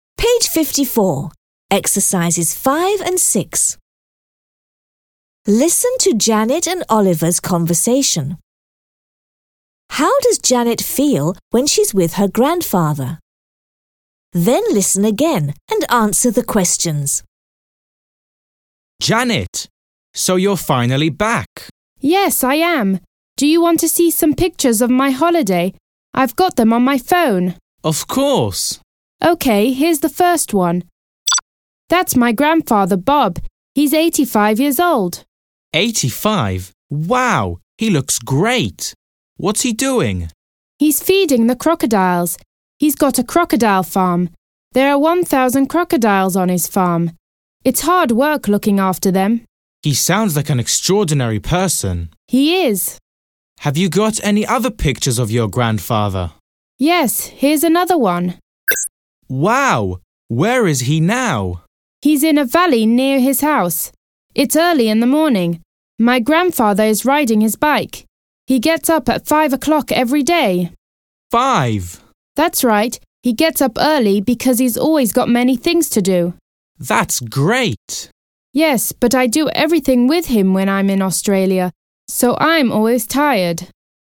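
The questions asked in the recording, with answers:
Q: How does Janet feel when she's with her grandfather?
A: She's always tired.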